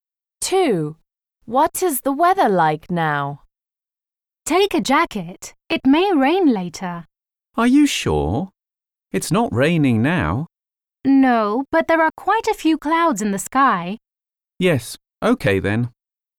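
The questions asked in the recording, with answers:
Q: What is the weather like now?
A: Cloudy, not raining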